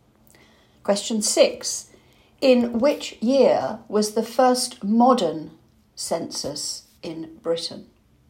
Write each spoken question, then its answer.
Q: In which year was the first modern census in Britain?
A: 1841.